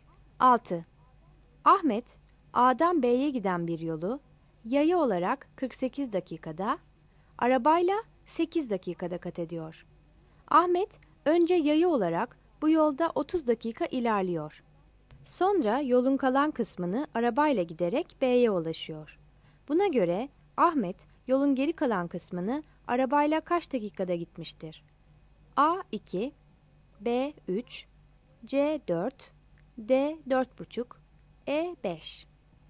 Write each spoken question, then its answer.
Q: Buna göre Ahmet, yolun geri kalan kısmını arabayla kaç dakikada gitmiştir?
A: Yanıt B'dir.